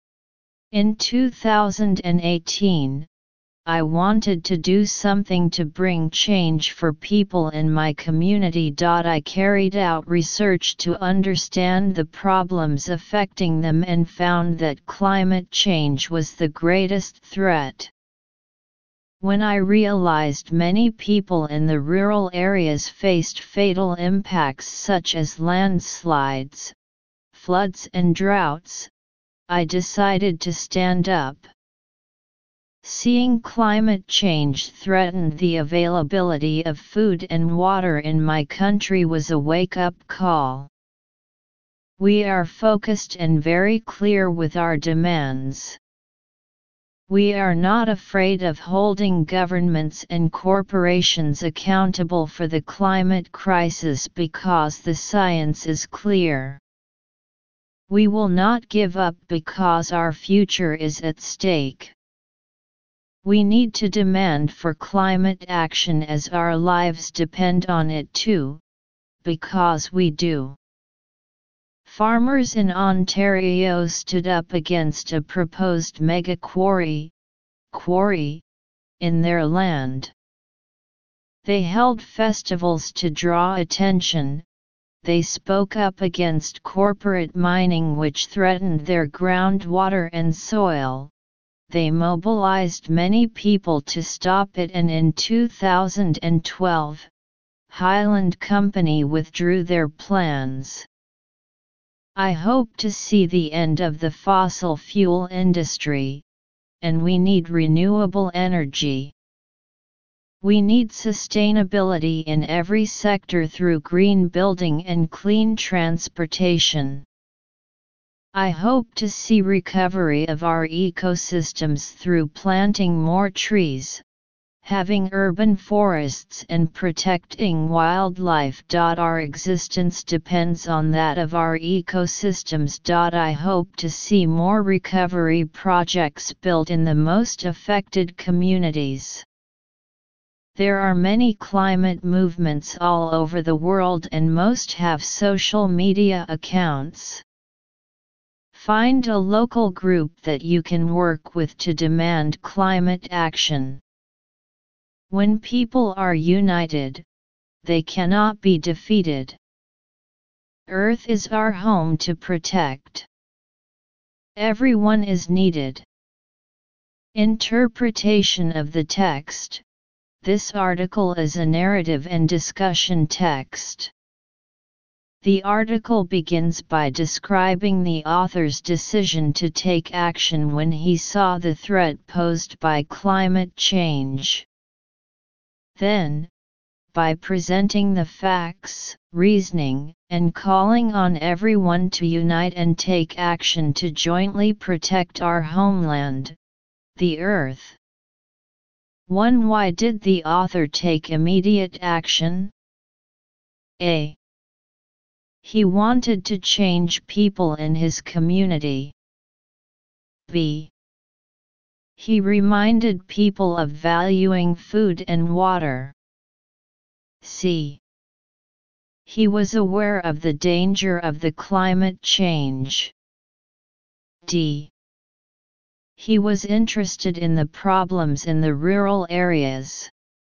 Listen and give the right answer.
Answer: Choose C